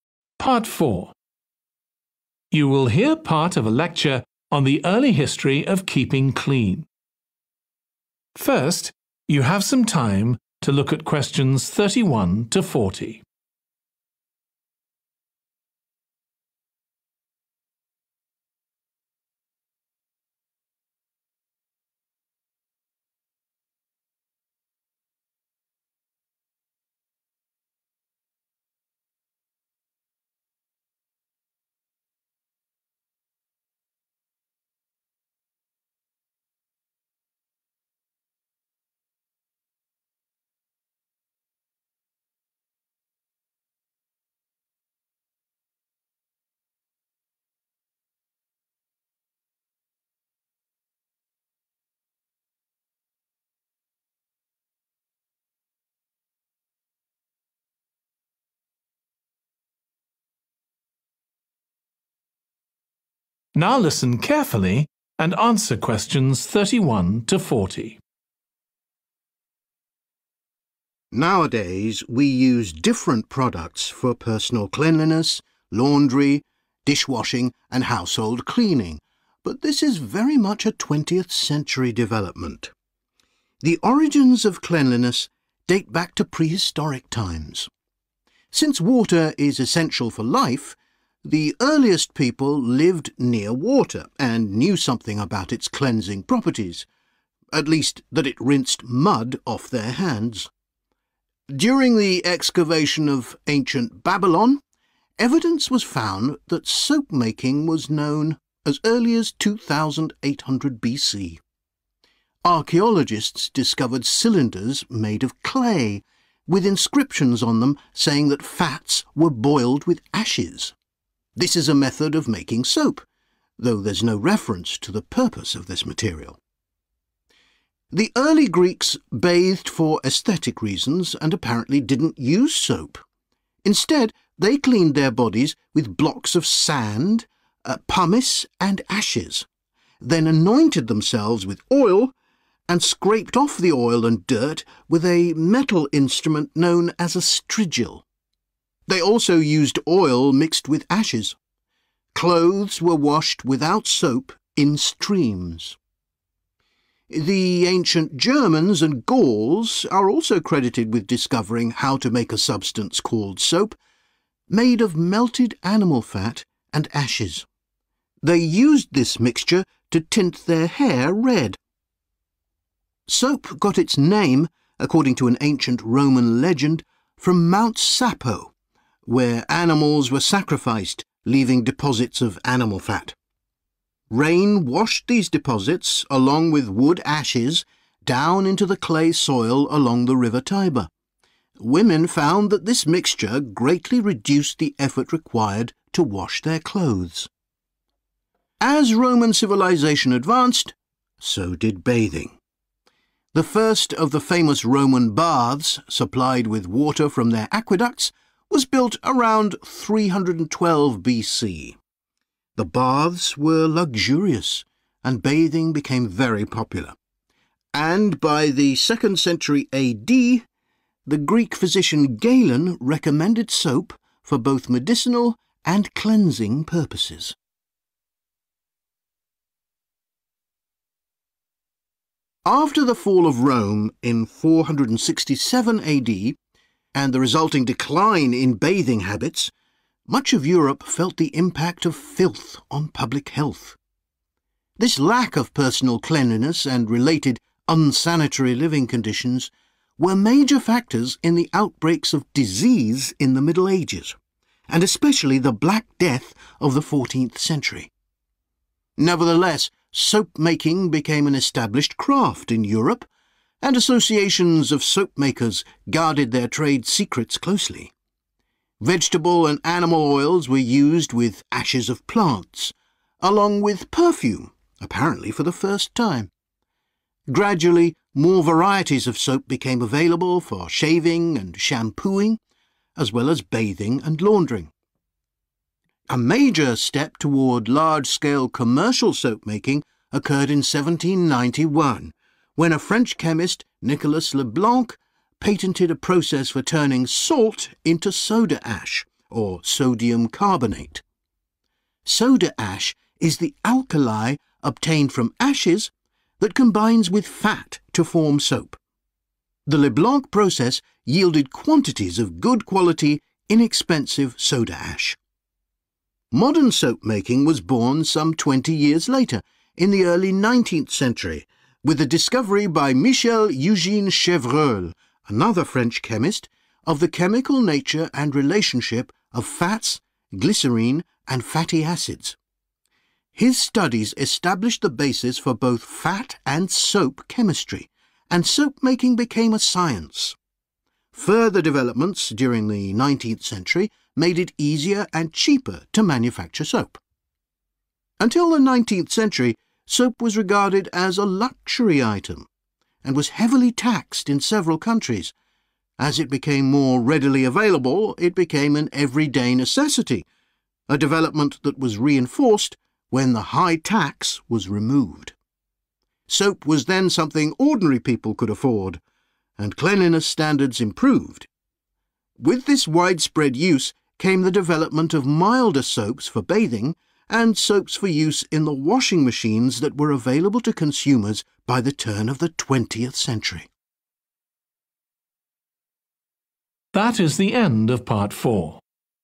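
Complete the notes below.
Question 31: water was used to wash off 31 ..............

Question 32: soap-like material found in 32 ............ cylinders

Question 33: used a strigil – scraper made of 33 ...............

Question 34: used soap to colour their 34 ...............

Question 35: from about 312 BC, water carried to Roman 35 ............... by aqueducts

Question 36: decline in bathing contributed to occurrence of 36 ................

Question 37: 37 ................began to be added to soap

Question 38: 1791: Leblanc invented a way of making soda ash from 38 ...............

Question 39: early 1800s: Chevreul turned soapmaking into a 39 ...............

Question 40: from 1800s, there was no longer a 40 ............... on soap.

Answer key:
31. mud
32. clay
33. metal
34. hair
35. baths
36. disease
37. perfume
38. salt
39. science
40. tax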